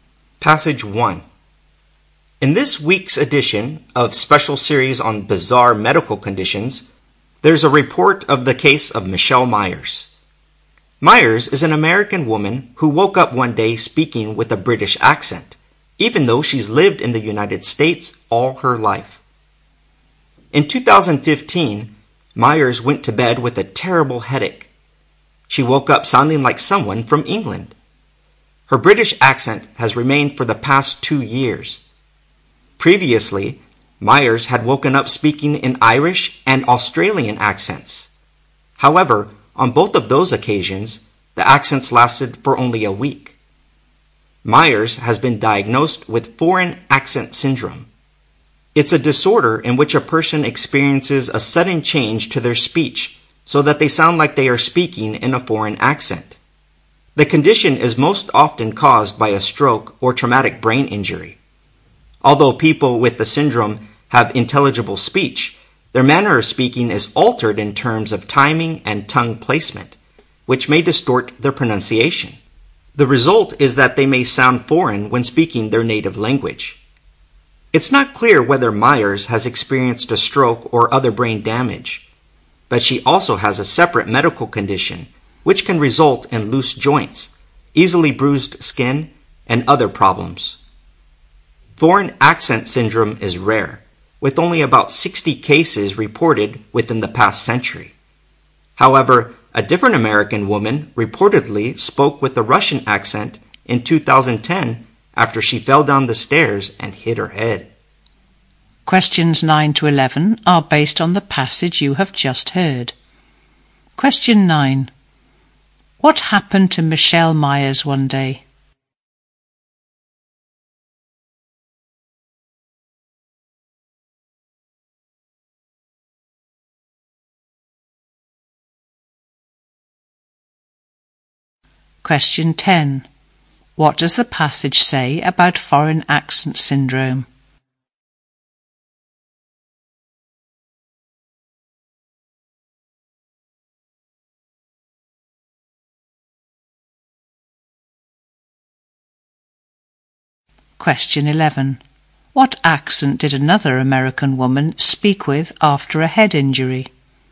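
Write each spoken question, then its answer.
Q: What happened to Michelle Myers one day?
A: She woke up speaking with a British accent

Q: What does the passage say about foreign accent syndrome?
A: It is rare, with about 60 cases in the past century

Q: What accent did another American woman speak with after a head injury?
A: A Russian accent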